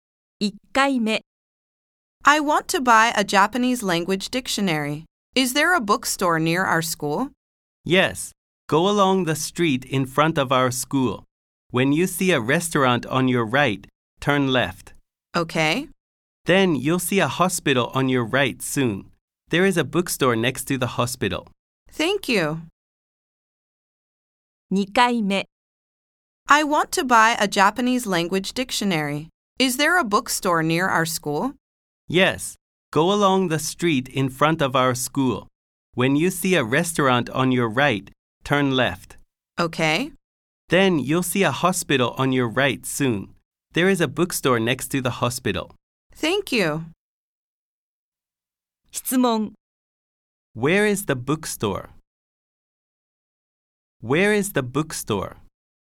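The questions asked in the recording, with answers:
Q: Where is the bookstore?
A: Next to the hospital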